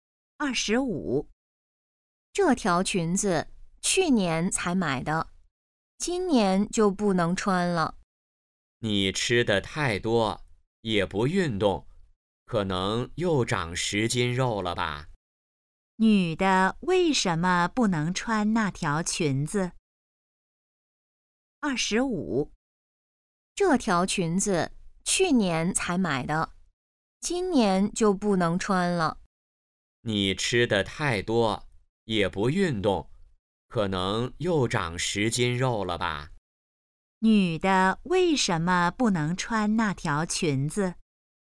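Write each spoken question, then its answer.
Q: 女的为什么不能穿那条裙子?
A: 她变胖了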